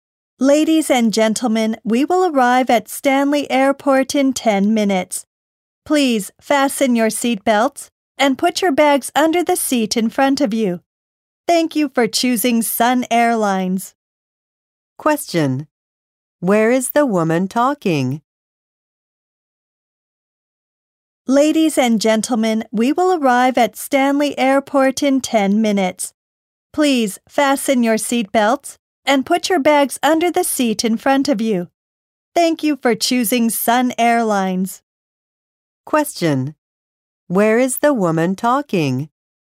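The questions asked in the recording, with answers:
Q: Question: Where is the woman talking?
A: On an airplane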